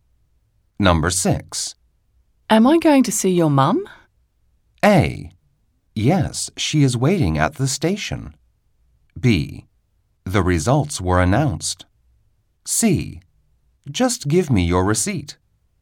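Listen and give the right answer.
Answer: A: Yes, she is waiting at the station.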